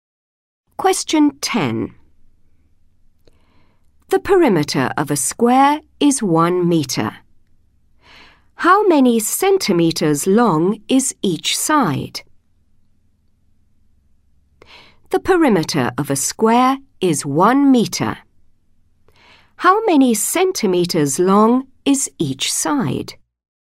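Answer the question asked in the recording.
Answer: 25 centimetres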